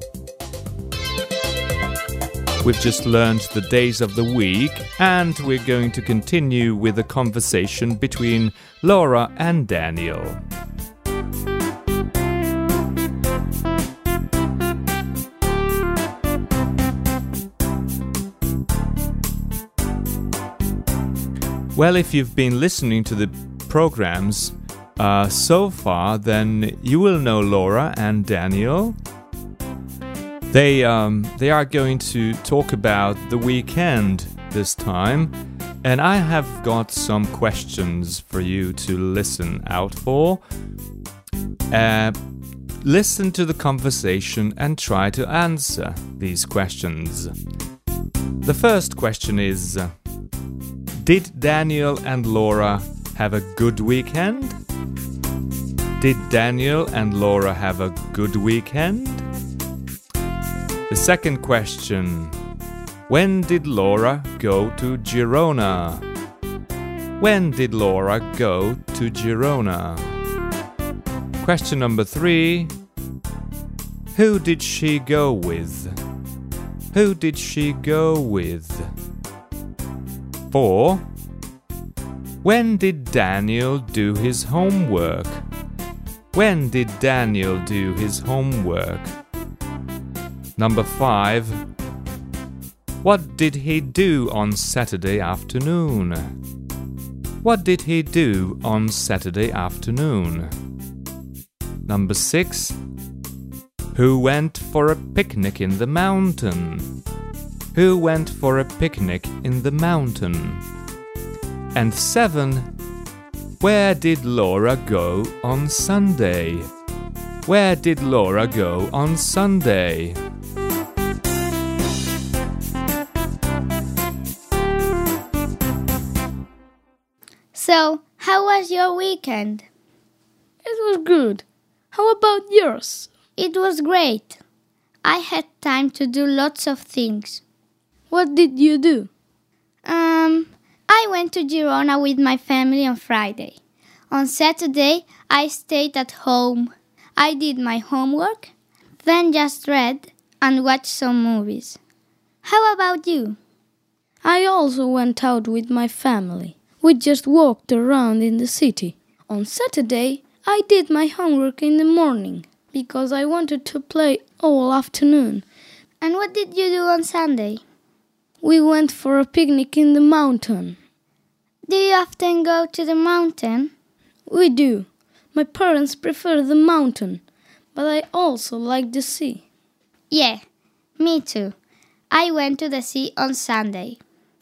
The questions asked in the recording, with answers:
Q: Did Daniel and Laura have a good weekend?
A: Yes, they did.

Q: When did Laura go to Girona?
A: Well, on Friday.

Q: Who did she go with?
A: With her family.

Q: When did Daniel do his homework?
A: On Saturday morning.

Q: What did he do on Saturday afternoon?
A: He played.

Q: Who went for a picnic in the mountain?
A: Daniel did.

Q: Where did Laura go on Sunday?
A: She went to the sea.